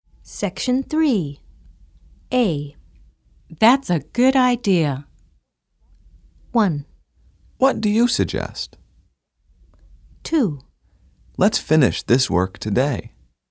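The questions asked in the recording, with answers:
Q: That's a good idea.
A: 2: Let's finish this work today.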